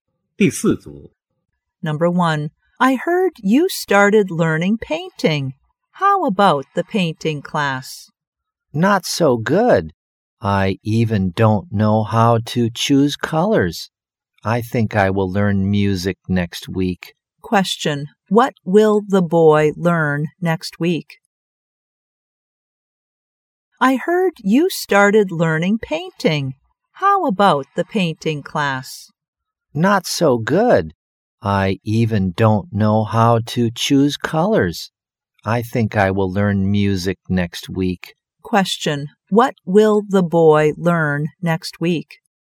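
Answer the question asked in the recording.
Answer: Music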